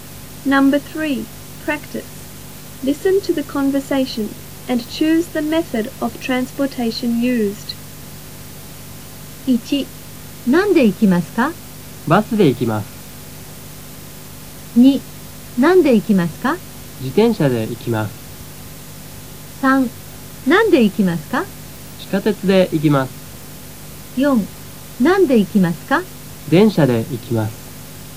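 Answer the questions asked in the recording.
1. バス
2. 自転車
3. 地下鉄
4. 電車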